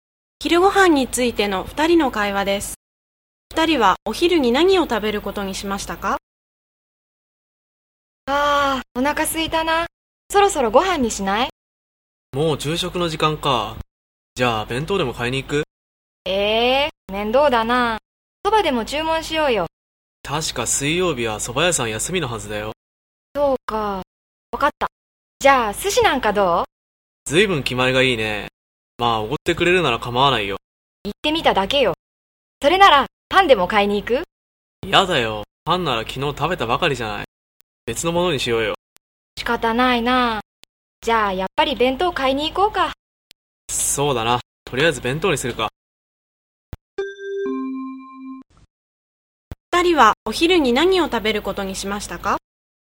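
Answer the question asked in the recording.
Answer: 弁当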